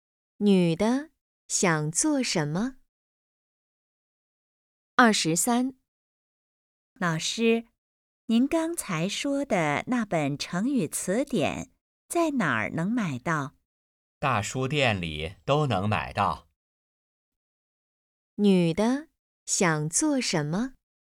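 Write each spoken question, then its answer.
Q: 女的想做什么?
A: 买成语词典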